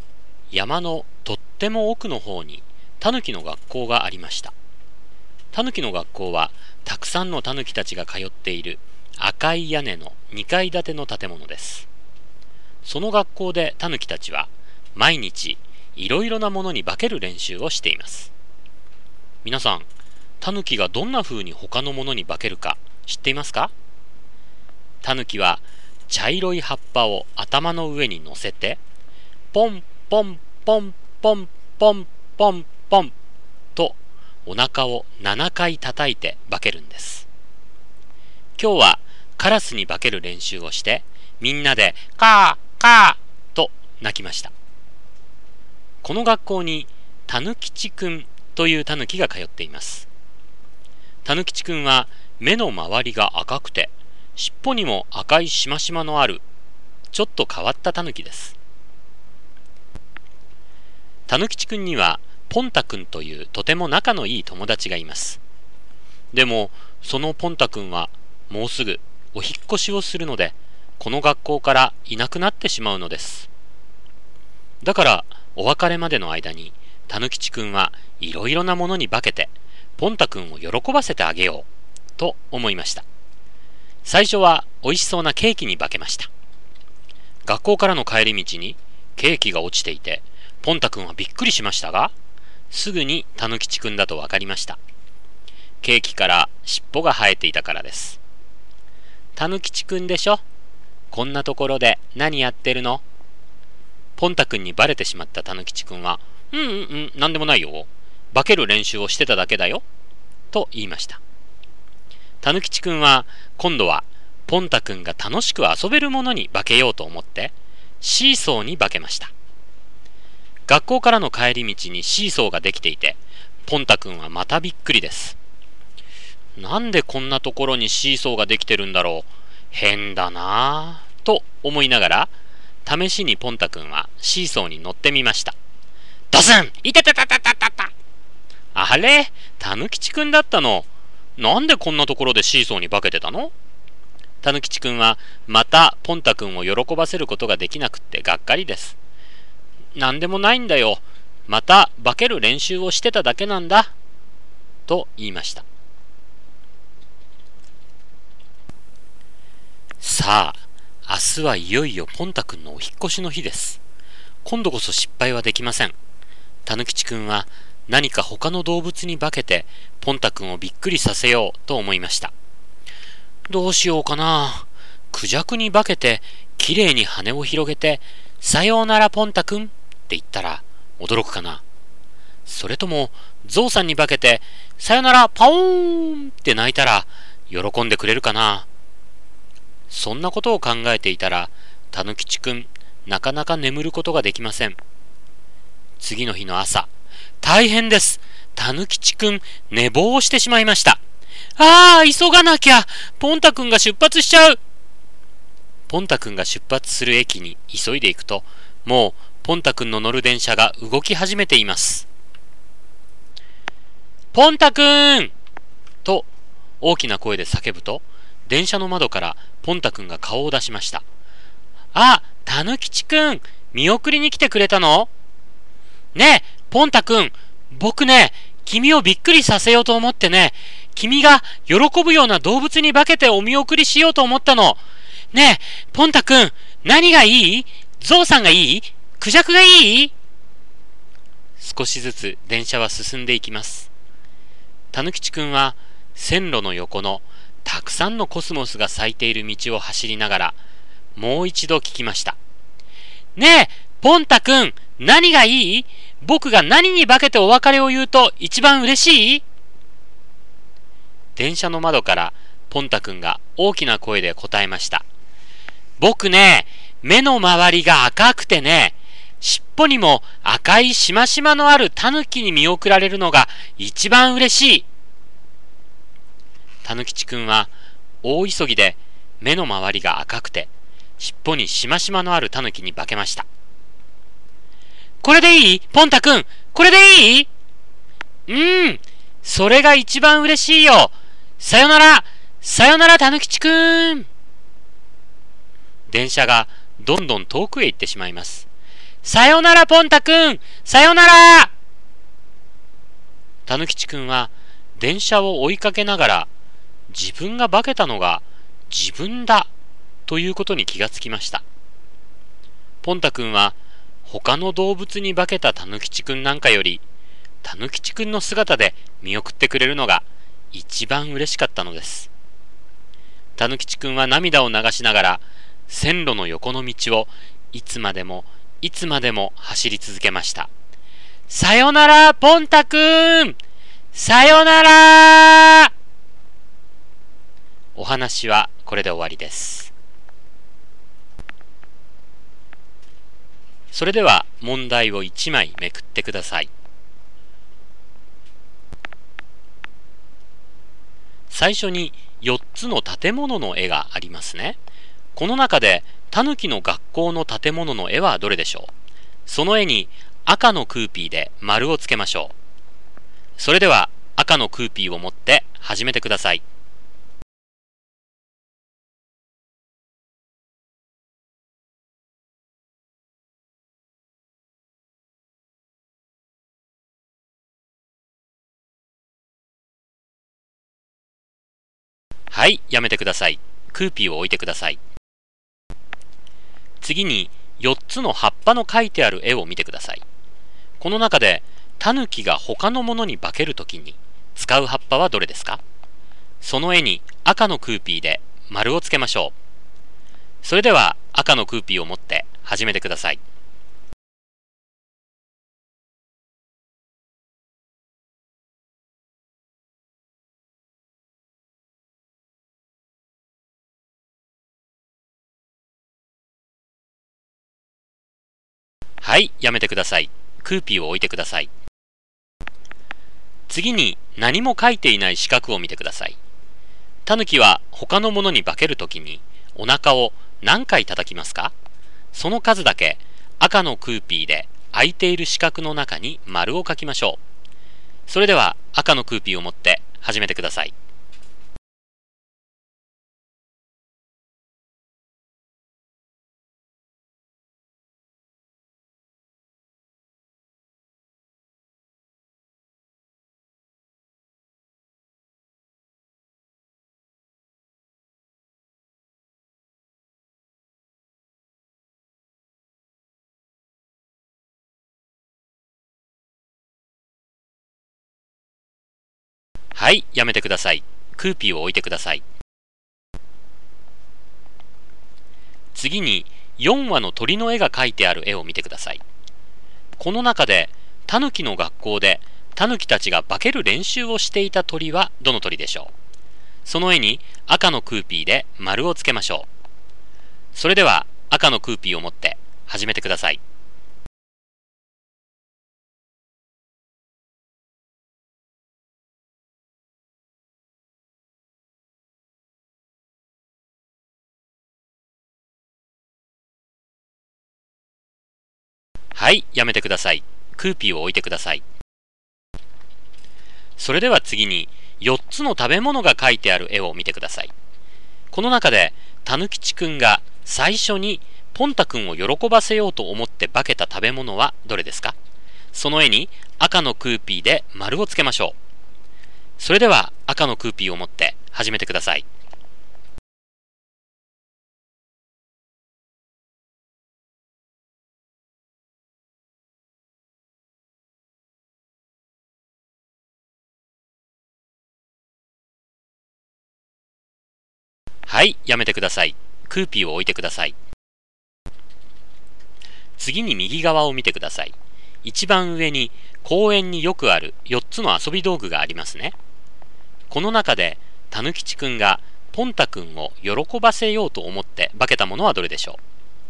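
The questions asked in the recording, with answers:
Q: この中でタヌキの学校の建物の絵はどれでしょう。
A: 赤い屋根の2階建ての建物

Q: この中でタヌキが他のものに化けるときに使う葉っぱはどれですか。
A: 茶色い葉っぱ

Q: タヌキは他のものに化けるときにお腹を何回叩きますか。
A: 7回

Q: この中で、タヌキの学校でタヌキたちが化ける練習をしていた鳥はどの鳥でしょう。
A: カラス

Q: この中で、たぬきちくんが最初にポンタくんを喜ばせようと思って化けた食べ物はどれですか?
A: ケーキ

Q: この中で、たぬきちくんがポンタくんを喜ばせようと思って化けたものはどれでしょう。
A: シーソー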